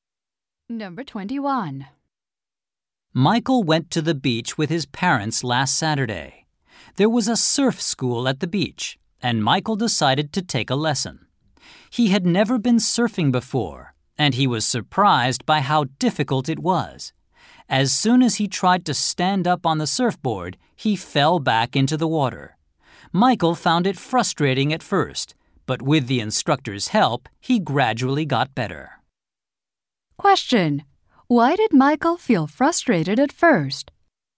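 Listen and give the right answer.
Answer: He kept falling off the surfboard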